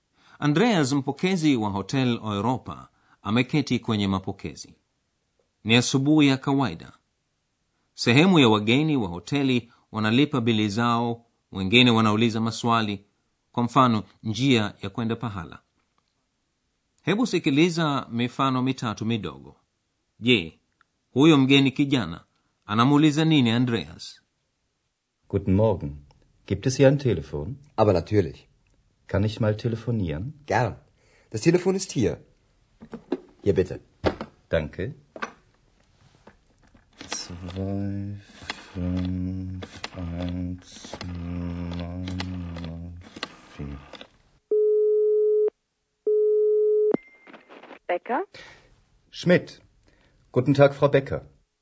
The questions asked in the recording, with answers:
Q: je huyo mgeni kijana anamuuliza nini andreas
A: kijana huyo alikuwa anauliza iwapo kuna simu?